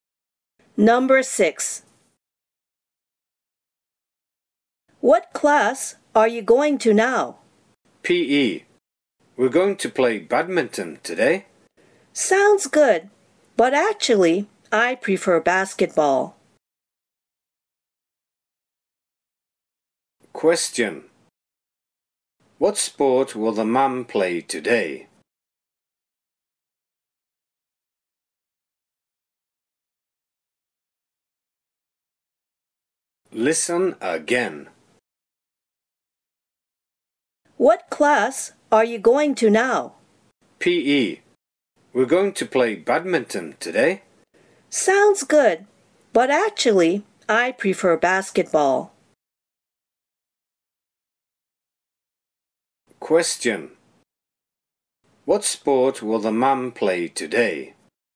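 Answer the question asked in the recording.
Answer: Badminton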